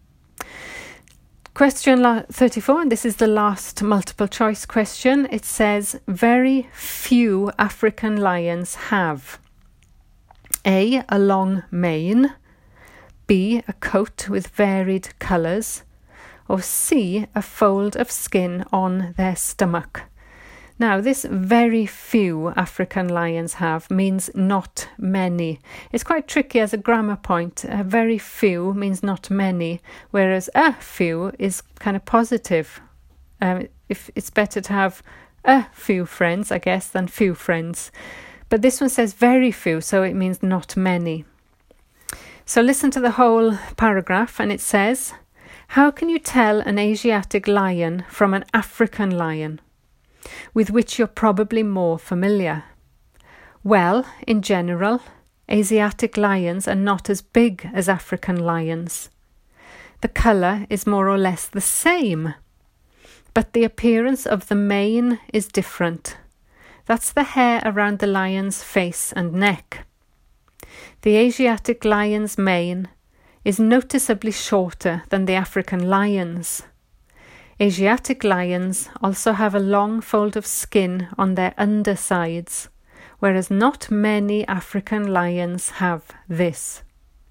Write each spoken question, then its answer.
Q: Very few African lions have A.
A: so the answer was C there, a fold of skin on their stomach.